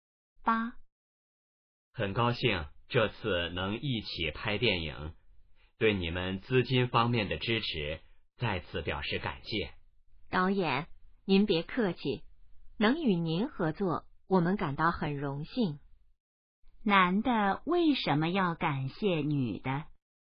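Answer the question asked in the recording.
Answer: 女的在资金方面给予支持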